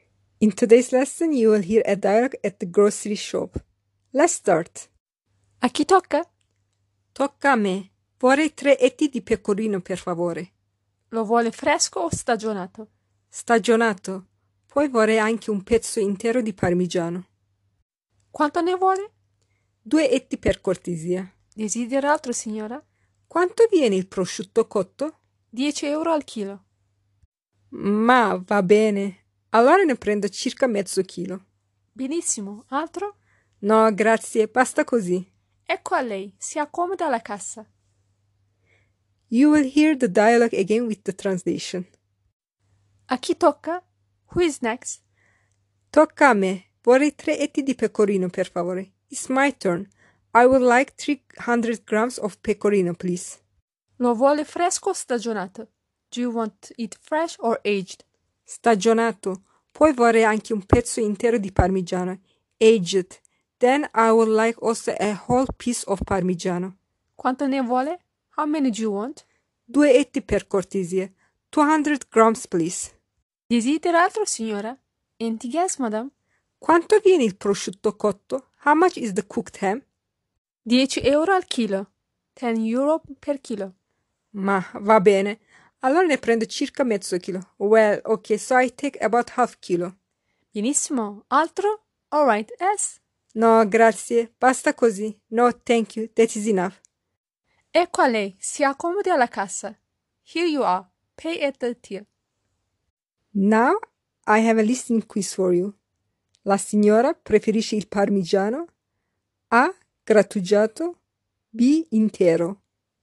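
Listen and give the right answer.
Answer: B: Intero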